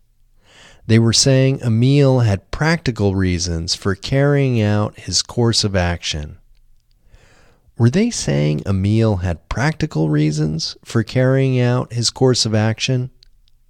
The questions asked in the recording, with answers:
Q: Were they saying Emil had practical reasons for carrying out his course of action?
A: Yes, they were saying Emil had practical reasons for carrying out his course of action.